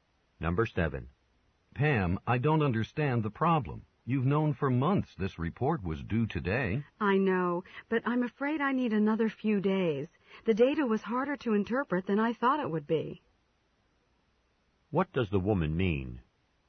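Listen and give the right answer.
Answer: She needs a few more days to finish the report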